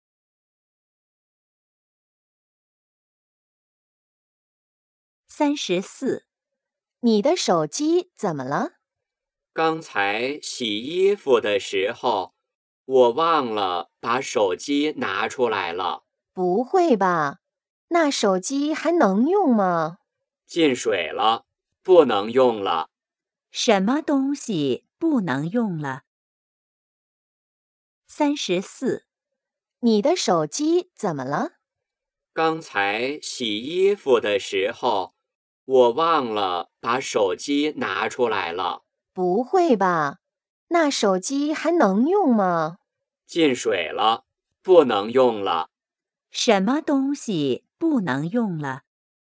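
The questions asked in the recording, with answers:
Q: 什么东西不能用了?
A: 手机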